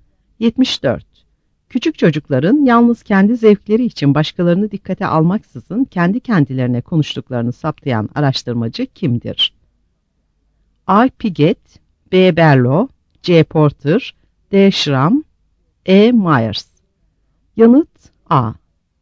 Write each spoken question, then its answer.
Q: Küçük çocukların yalnız kendi zevkleri için başkalarını dikkate almaksızın kendi kendilerine konuştuklarını saptayan araştırmacı kimdir?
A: Yanıt A.